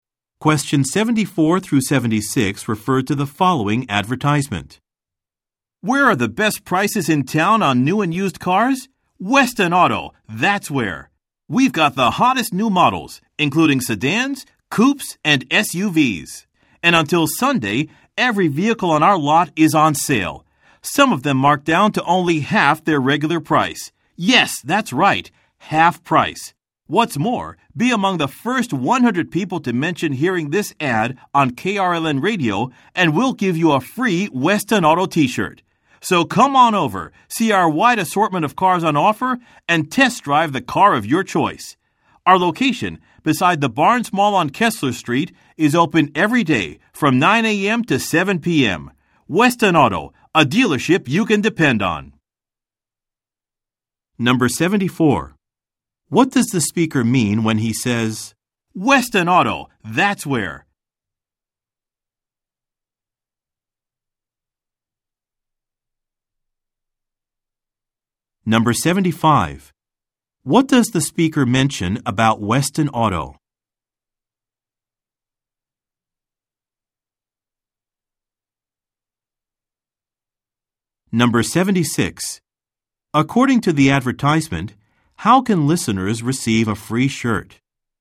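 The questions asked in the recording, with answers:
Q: What does the speaker mean when he says, Weston Auto, that's where?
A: Weston Auto has the best prices in town on new and used cars

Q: According to the advertisement, how can listeners receive a free shirt?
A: By being among the first 100 people to mention hearing the ad on KRLN Radio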